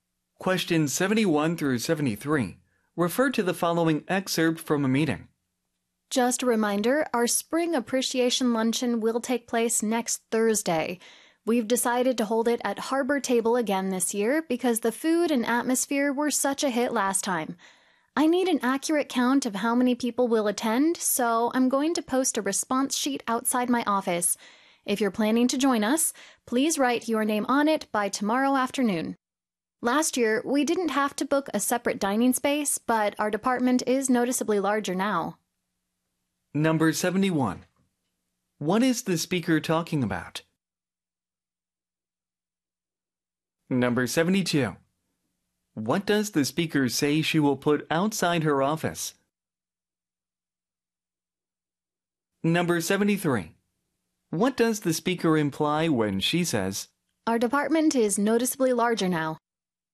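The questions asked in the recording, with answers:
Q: What is the speaker talking about?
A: The spring appreciation luncheon

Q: What does the speaker say she will put outside her office?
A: A response sheet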